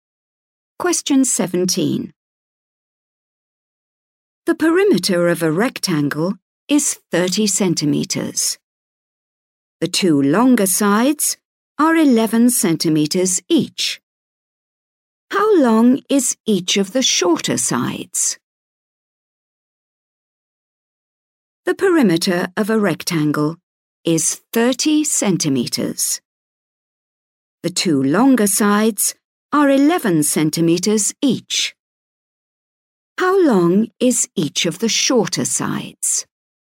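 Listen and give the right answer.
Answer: 4 centimetres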